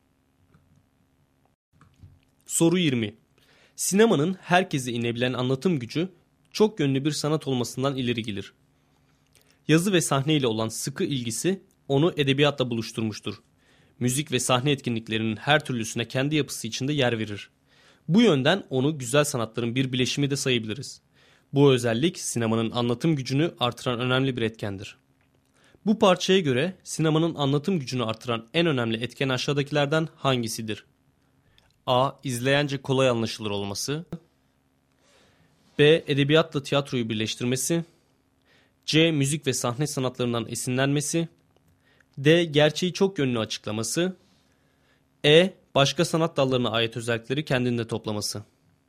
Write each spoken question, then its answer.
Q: Bu parçaya göre sinemanın anlatım gücünü artıran en önemli etken aşağıdakilerden hangisidir?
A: Doğru cevap E şıkkı.